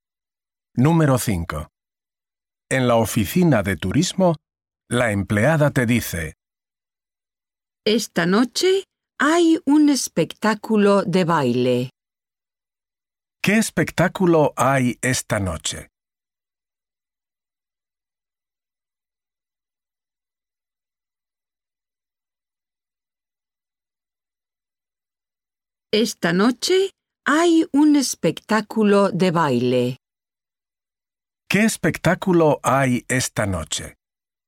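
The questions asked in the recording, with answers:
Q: ¿Qué espectáculo hay esta noche?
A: Un espectáculo de baile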